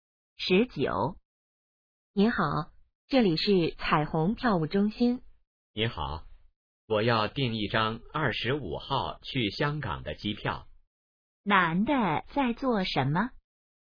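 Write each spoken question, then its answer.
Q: 男的在做什么?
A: 订机票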